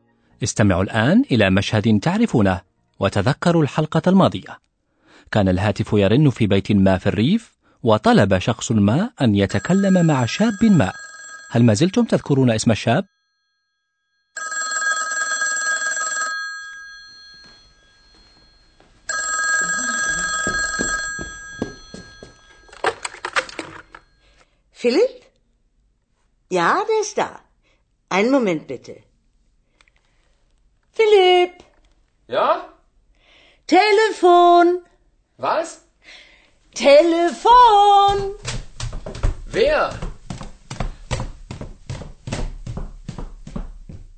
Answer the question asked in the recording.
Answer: إذا كان هذا الشاب هو فيليب.